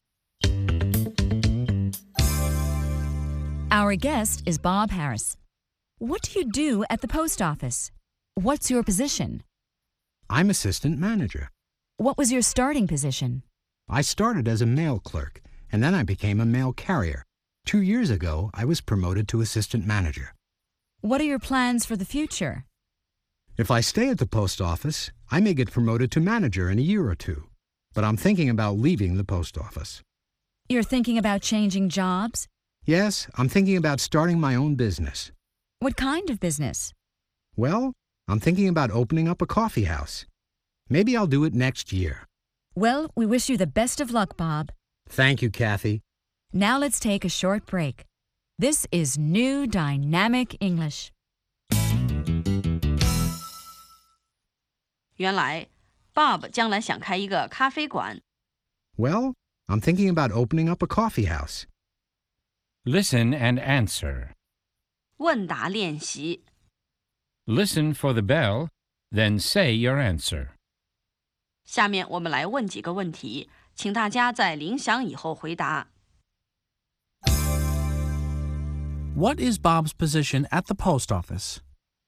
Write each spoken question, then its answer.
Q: What is Bob's position at the post office?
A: He's assistant manager.